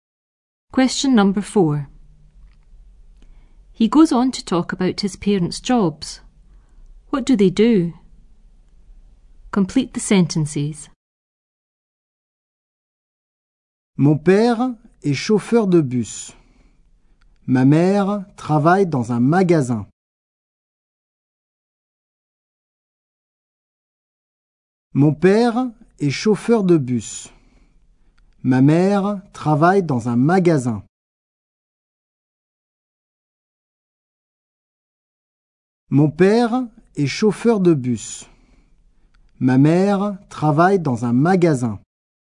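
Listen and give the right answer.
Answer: Father is a bus driver; mother works in a shop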